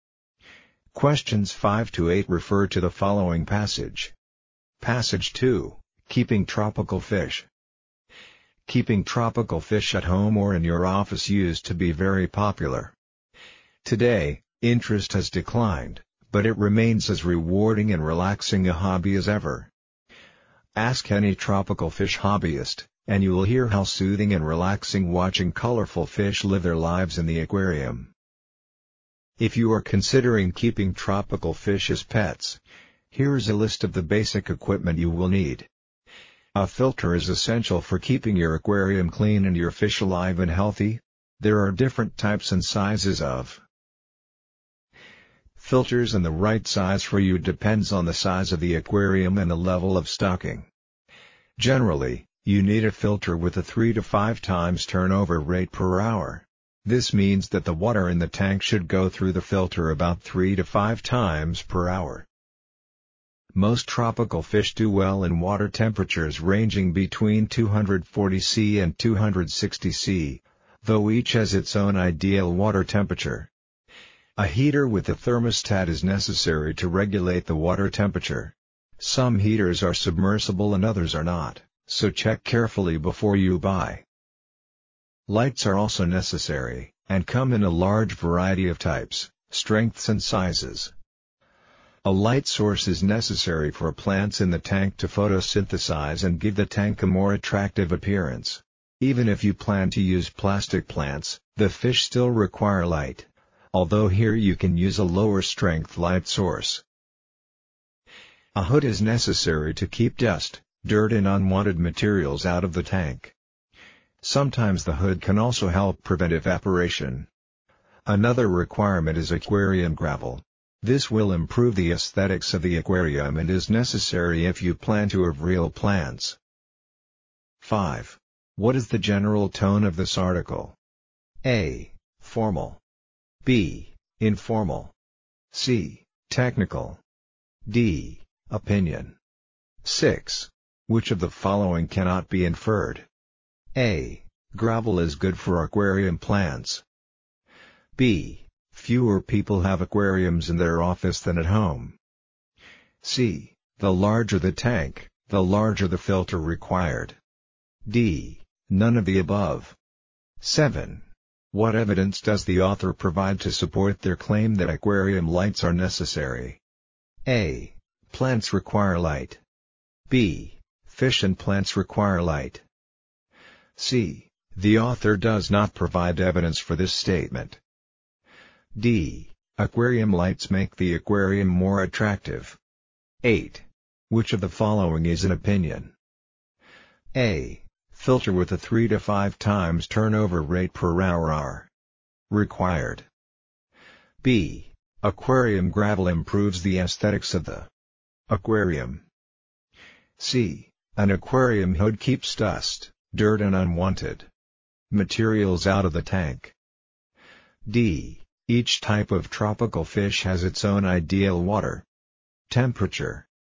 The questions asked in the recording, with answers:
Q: What is the general tone of this article?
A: 5. B. The general tone is informal.

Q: Which of the following cannot be inferred?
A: 6. B. The statement, fewer people have aquariums in their office than at home, cannot be inferred from this article.

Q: What evidence does the author provide to support their claim that aquarium lights are necessary?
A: 7. B. Both plants and fish need lights.

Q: Which of the following is an opinion?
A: 8. B. The following statement is an opinion.